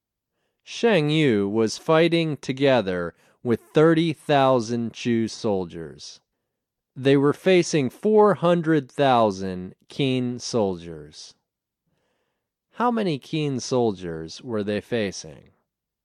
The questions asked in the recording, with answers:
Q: How many Qin soldiers were they facing?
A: They were facing 400,000 soldiers.